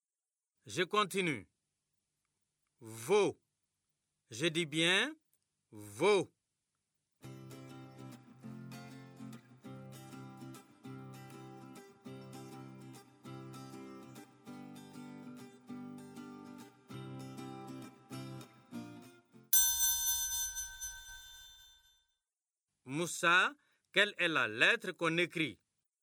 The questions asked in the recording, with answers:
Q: Moussa, quelle est la lettre qu'on écrit?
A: Monsieur, c'est la lettre V.